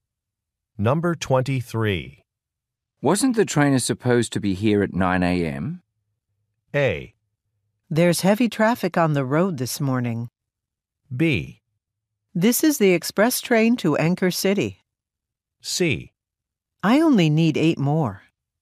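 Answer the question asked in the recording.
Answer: A: There's heavy traffic on the road this morning.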